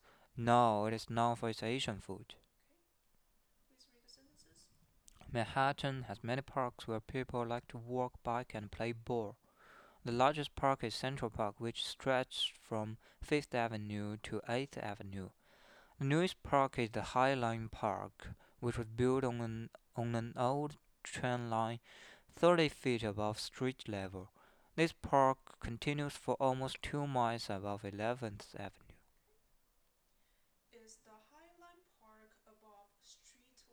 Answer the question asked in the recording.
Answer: Yes, it is above the street level.